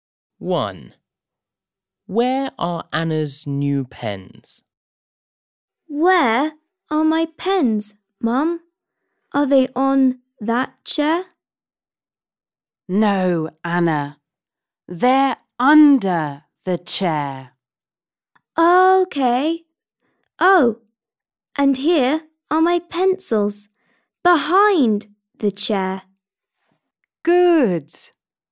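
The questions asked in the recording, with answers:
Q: Where are Anna's new pens?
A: Under the chair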